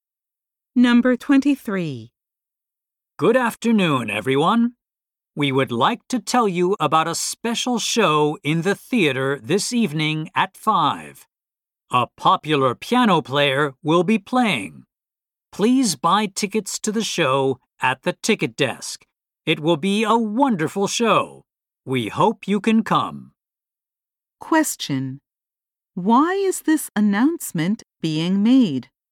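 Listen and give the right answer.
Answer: To tell people about a piano show in the theater this evening.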